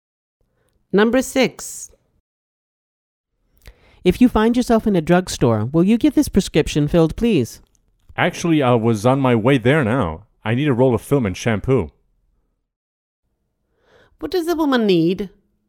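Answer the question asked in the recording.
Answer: a roll of film and shampoo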